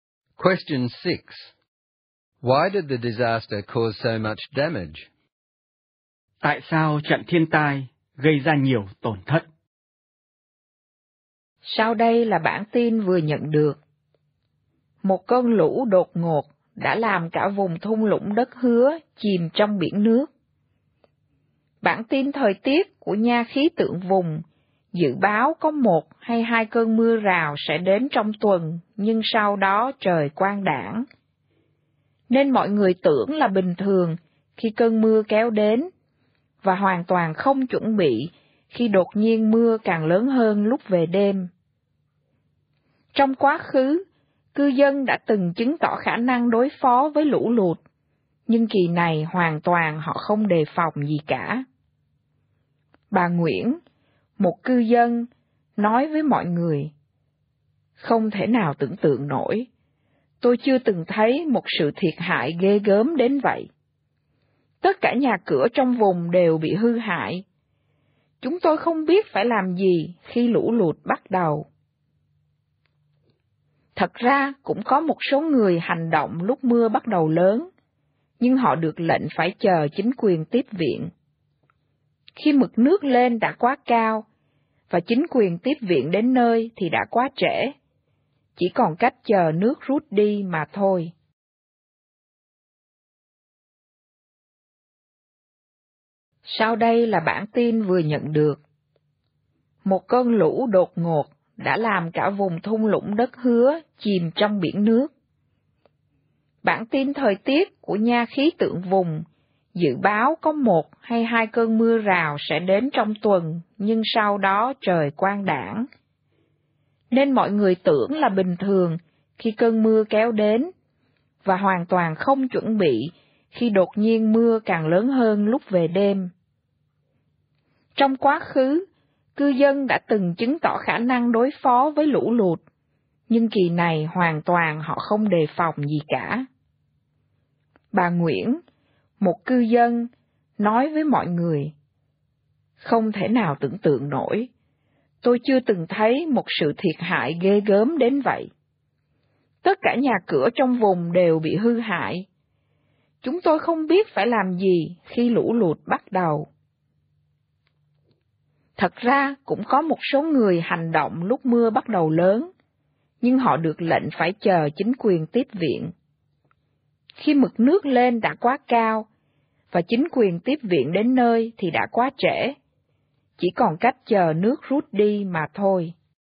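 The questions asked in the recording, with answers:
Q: Why did the disaster cause so much damage?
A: The forecast said only a shower or two and then clear weather, so people didn't prepare when heavy rain came at night. People who wanted to act were told to wait for the authorities, and help arrived too late.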